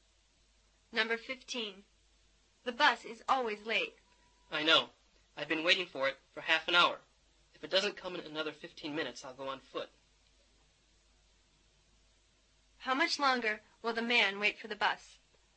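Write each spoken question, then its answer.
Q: How much longer will the man wait for the bus?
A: 15 minutes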